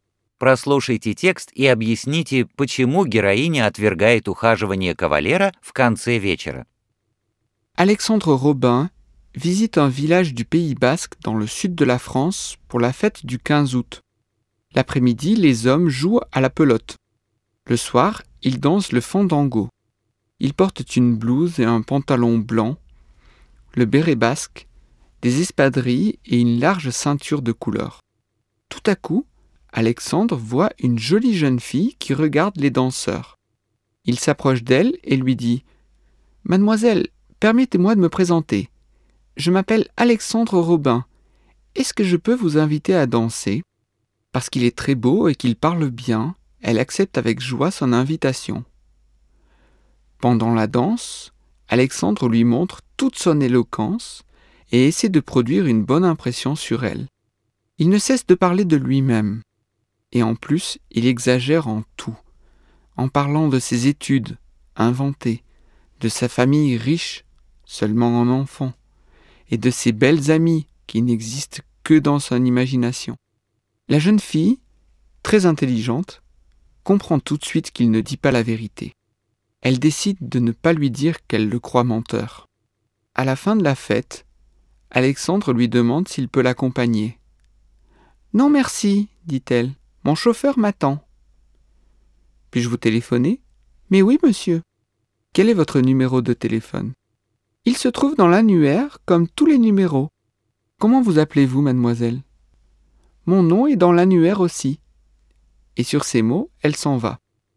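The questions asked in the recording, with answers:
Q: Прослушайте текст и объясните, почему героиня отвергает ухаживание кавалера в конце вечера.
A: Она поняла, что он хвастается и лжёт (выдумывает учёбу, богатую семью и подруг).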